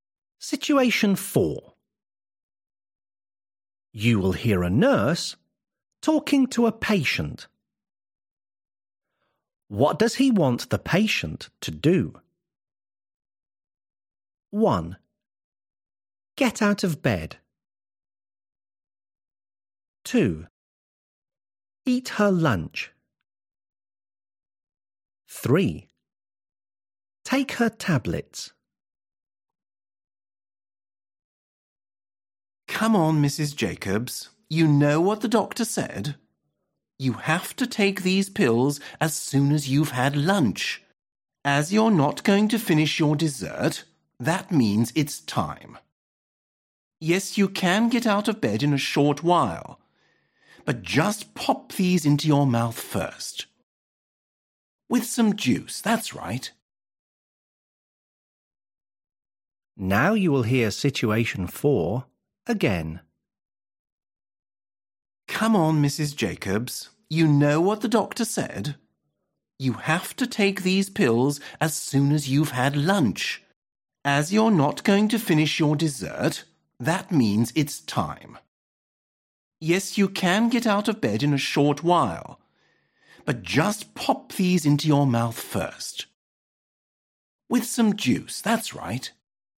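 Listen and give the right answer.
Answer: 3: Take her tablets.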